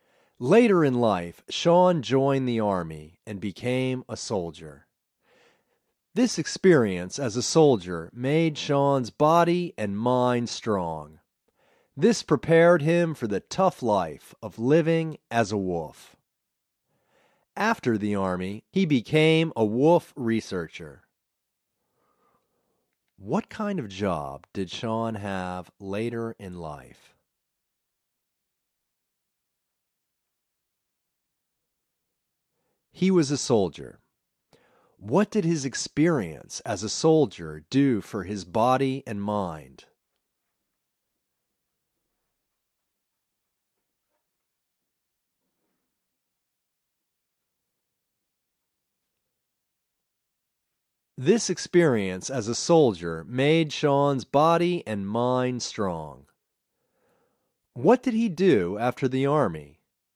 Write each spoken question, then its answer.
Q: What did he do after the army?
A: He became a wolf researcher.